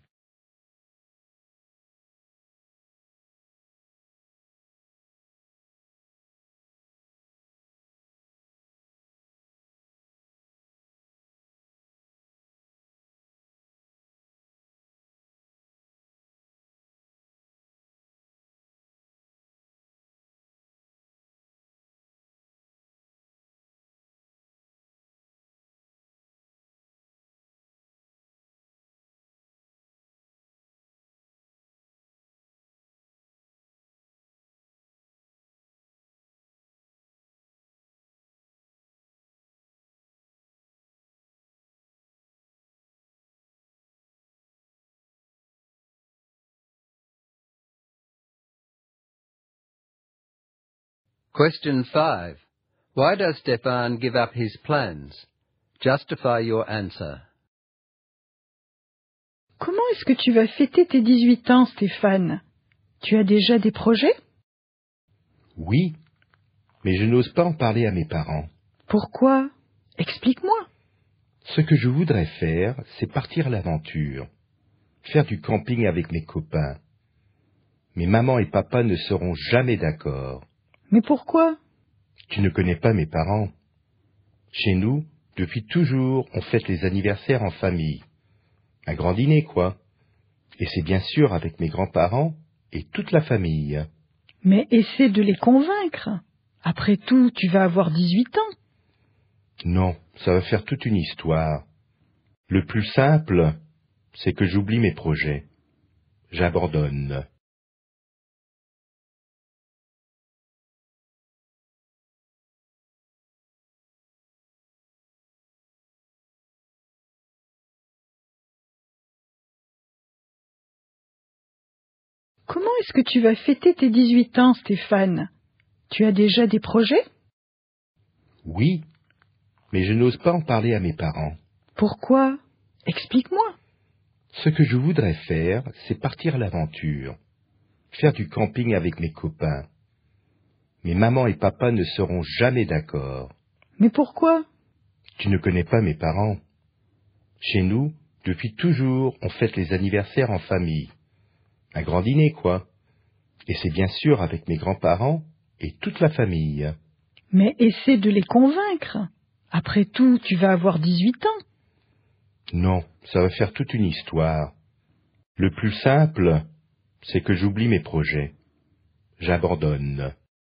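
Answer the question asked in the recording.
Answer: His family always celebrates birthdays together with a big dinner. His parents would never agree to a camping trip with friends, and he wants to avoid a big fuss.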